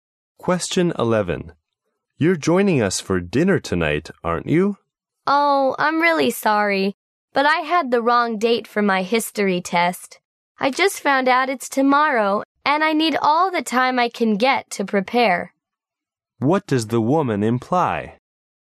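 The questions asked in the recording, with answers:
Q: What does the woman imply?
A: She can't come to dinner because she must prepare for her history test tomorrow.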